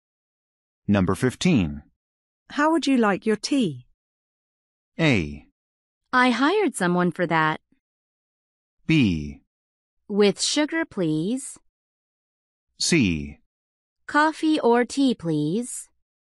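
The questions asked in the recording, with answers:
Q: How would you like your tea?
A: B: With sugar, please.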